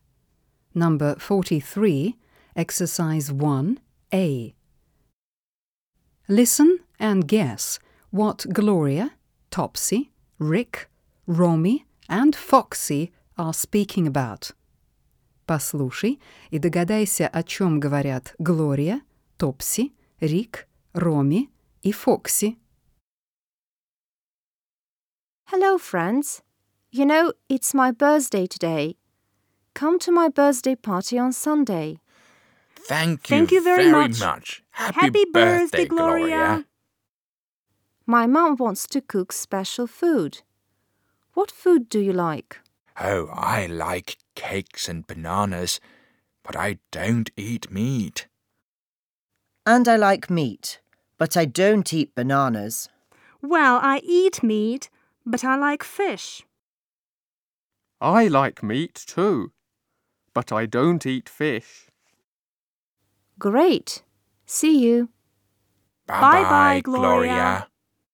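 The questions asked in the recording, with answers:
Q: Listen and guess what Gloria, Topsy, Rick, Romy and Foxy are speaking about.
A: Gloria's birthday party and the food they like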